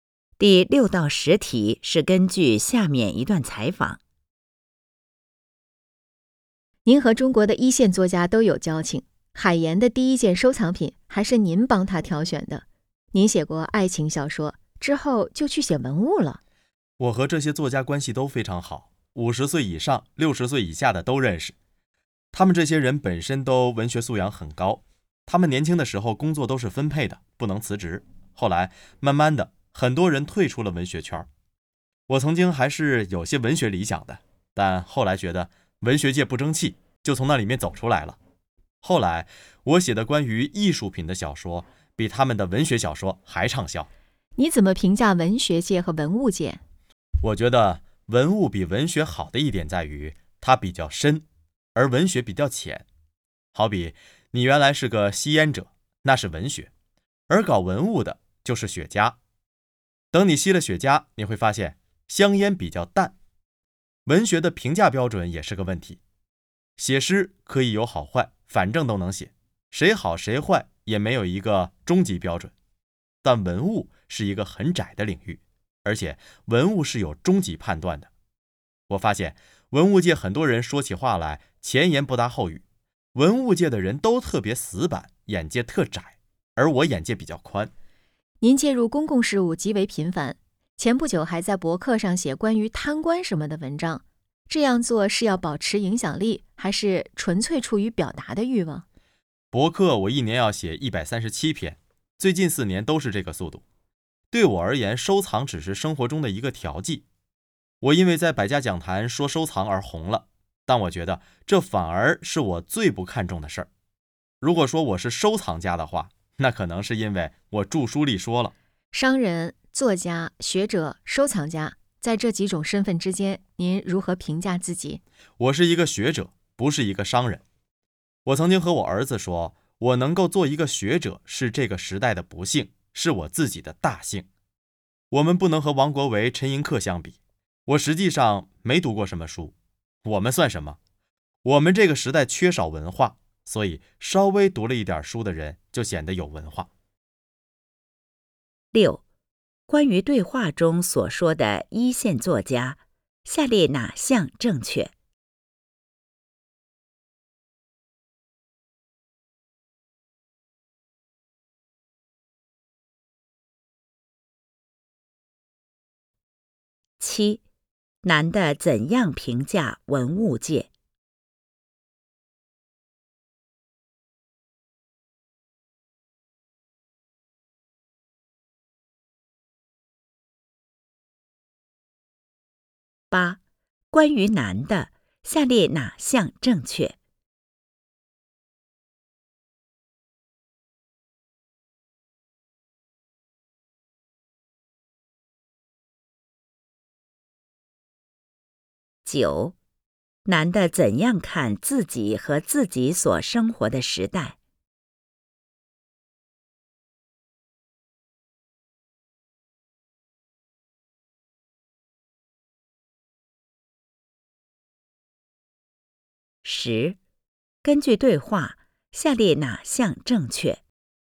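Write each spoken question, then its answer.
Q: 男的怎样评价文物界?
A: 文物比文学深,有终极判断,但文物界很多人死板、眼界窄

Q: 男的怎样看自己和自己所生活的时代?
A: 自己是学者,没读过什么书;这个时代缺少文化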